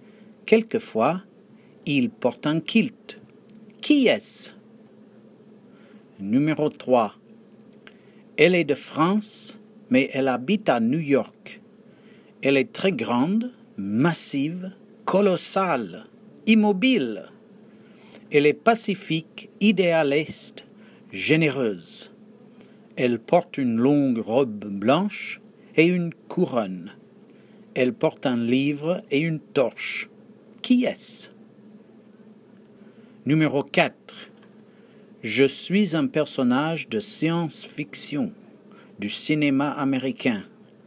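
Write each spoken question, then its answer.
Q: Qui est-ce?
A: La statue de la Liberté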